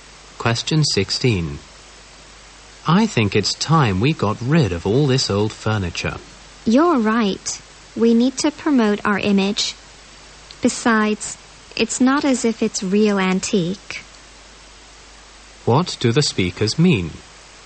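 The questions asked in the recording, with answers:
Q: What do the speakers mean?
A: They should replace the old furniture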